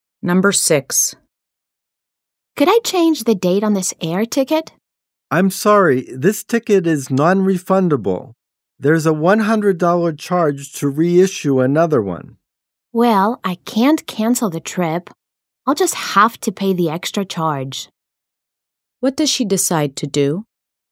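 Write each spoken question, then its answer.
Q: What does she decide to do?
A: Pay the $100 charge to reissue the ticket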